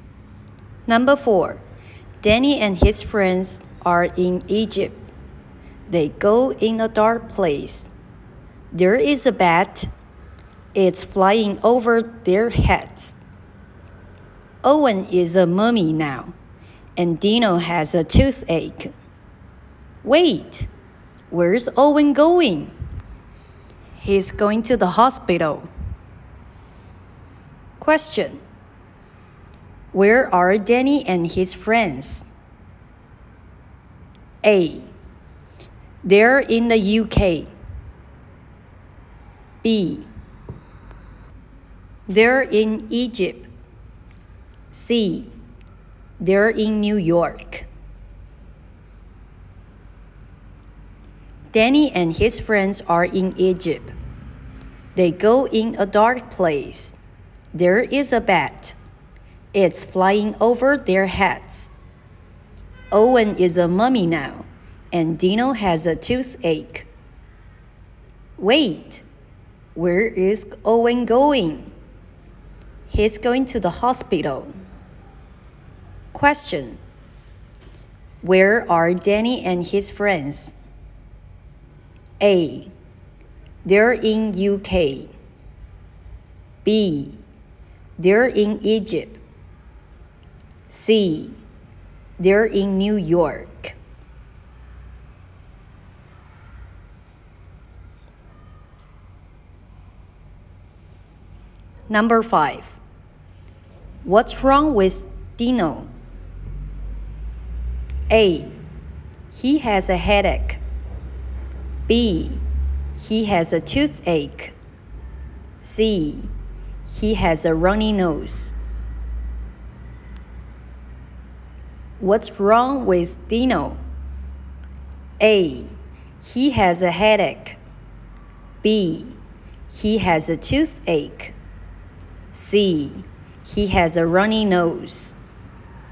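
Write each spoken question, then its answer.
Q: Where are Danny and his friends?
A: B: They're in Egypt.

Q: What's wrong with Dino?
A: B: He has a toothache.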